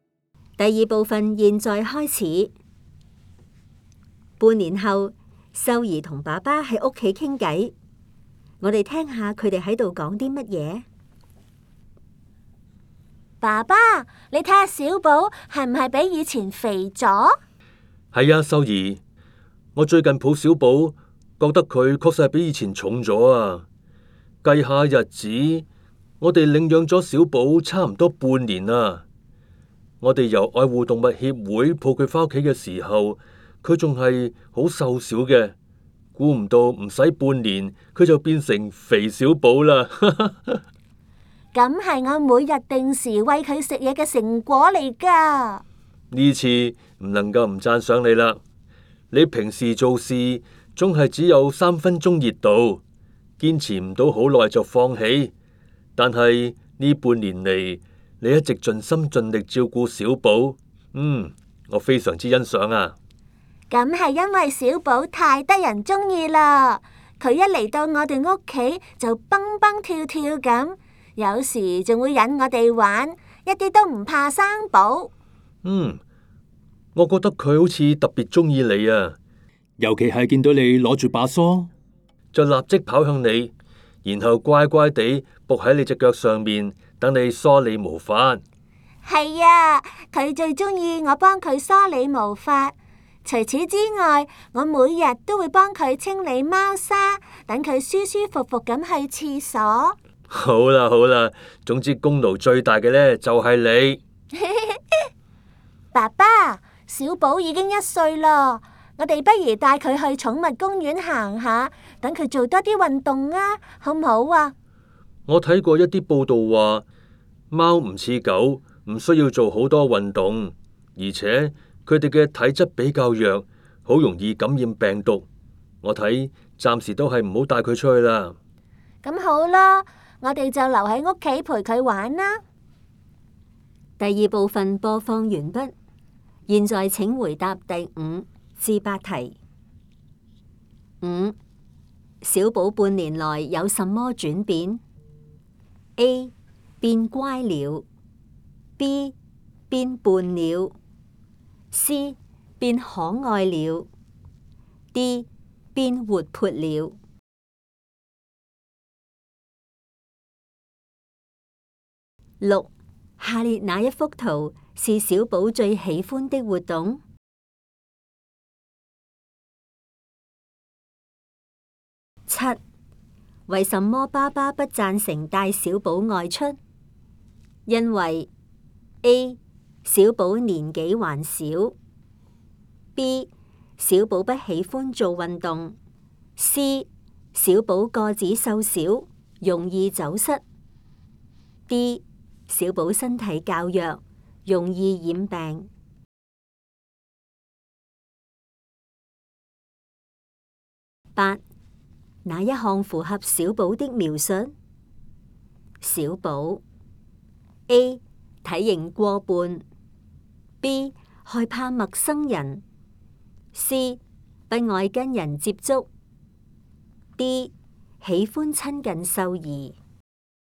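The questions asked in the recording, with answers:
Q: 为什么爸爸不赞成带小宝外出?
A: D: 小宝身体较弱,容易染病。

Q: 哪一项符合小宝的描述?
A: D: 喜欢亲近秀儿。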